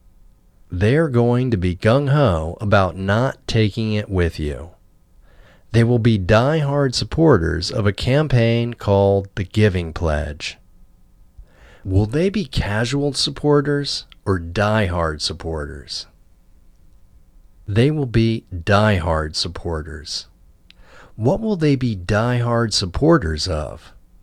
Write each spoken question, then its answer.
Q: Will they be casual supporters or die-hard supporters?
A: They will be die-hard supporters.

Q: What will they be die-hard supporters of?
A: They will be die-hard supporters of a campaign called the Giving Pledge.